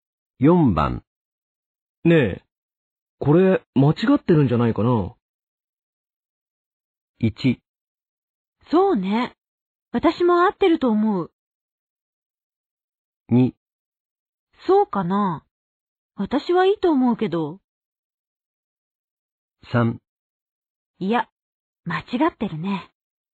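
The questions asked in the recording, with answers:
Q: ねえ、これ間違ってるんじゃないかな?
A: 2: そうかな。私はいいと思うけど。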